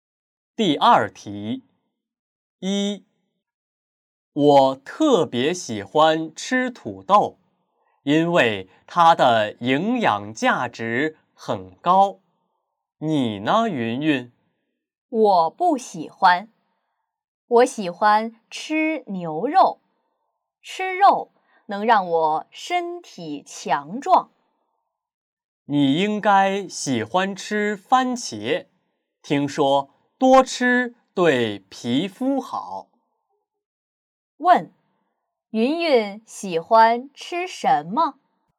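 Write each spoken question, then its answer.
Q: 问,云云喜欢吃什么?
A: 牛肉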